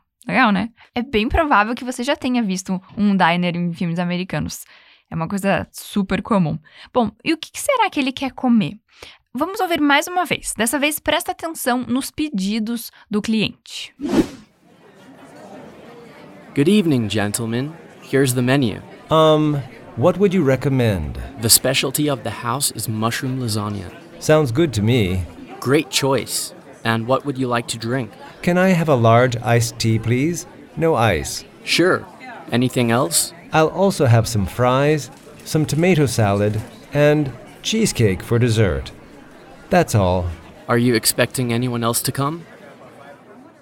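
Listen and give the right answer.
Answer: Lasanha de cogumelos, batata frita, salada de tomate e cheesecake de sobremesa (e um chá gelado grande sem gelo)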